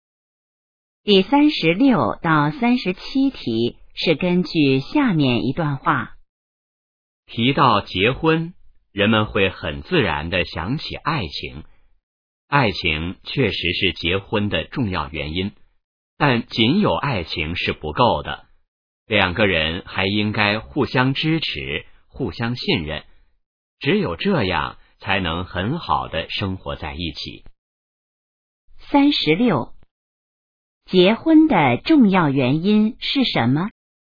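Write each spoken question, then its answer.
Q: 结婚的重要原因是什么?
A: 爱情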